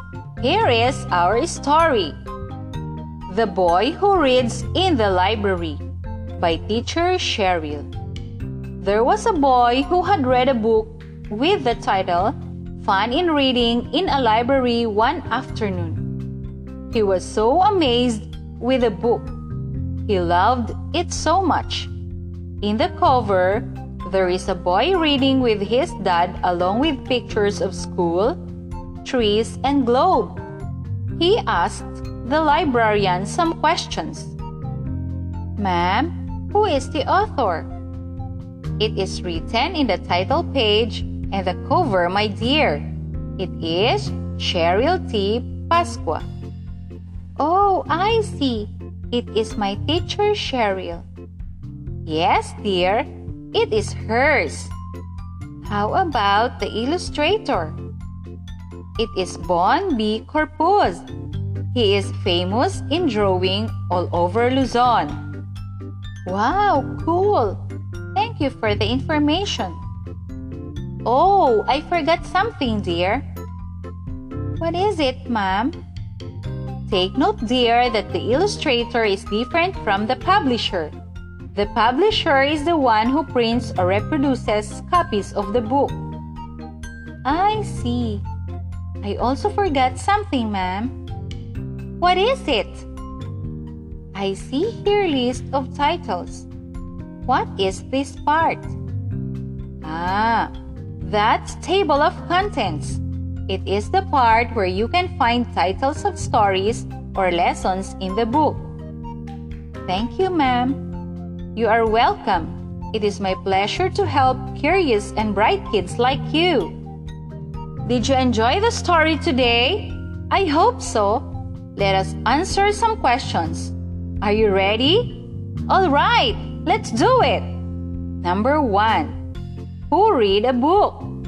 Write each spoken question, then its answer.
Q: Number one, who read a book?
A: The boy read a book.